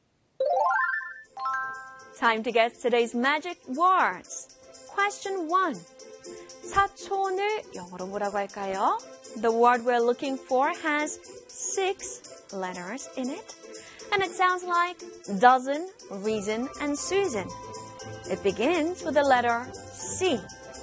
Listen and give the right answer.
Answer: 사촌 in English is C-O-U-S-I-N, cousin.